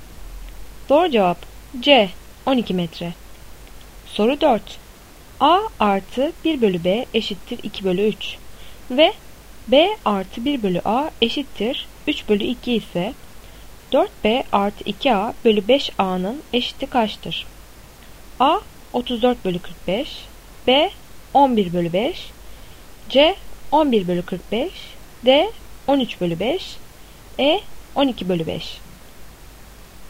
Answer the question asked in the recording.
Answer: Doğru cevap B 11 bölü 5.